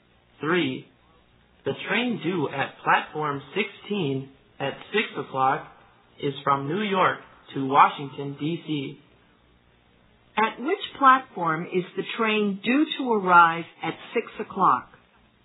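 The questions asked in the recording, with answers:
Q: At which platform is the train due to arrive at 6 o'clock?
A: Platform 16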